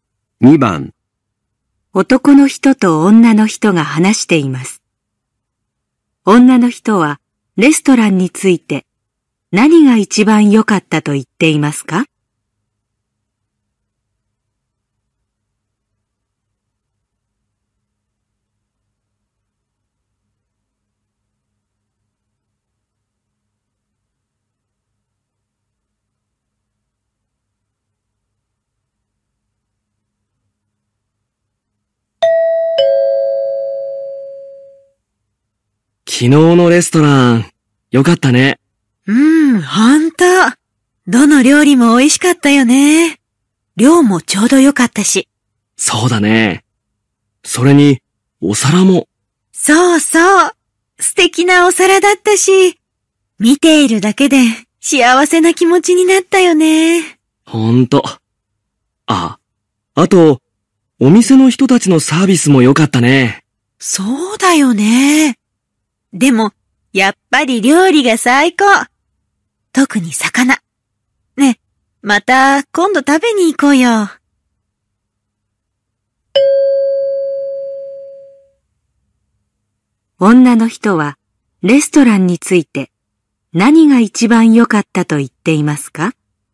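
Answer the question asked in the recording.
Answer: 料理(特に魚)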